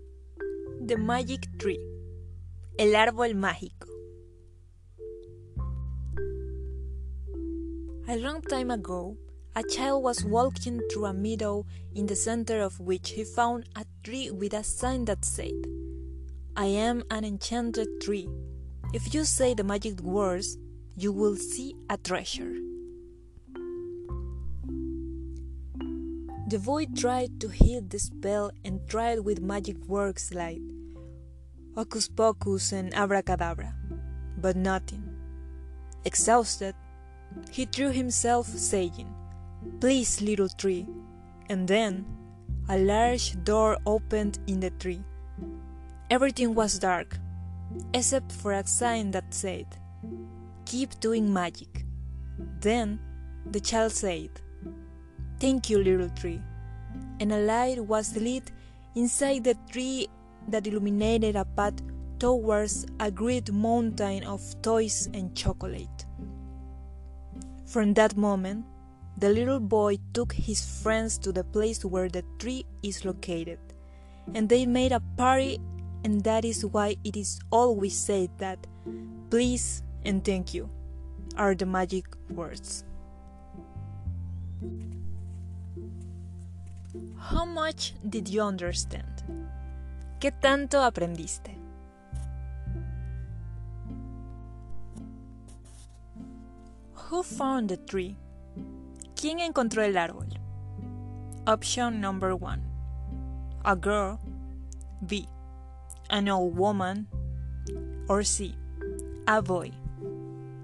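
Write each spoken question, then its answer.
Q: Who found the tree?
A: C: A boy.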